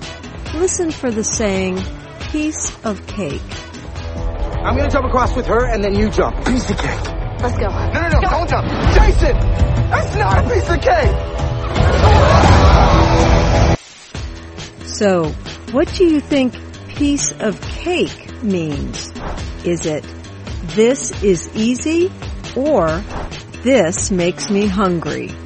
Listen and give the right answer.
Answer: Piece of cake means this is easy.